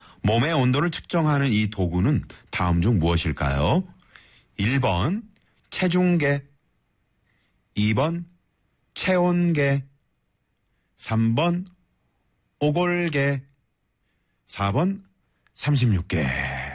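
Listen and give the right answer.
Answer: 2번: 체온계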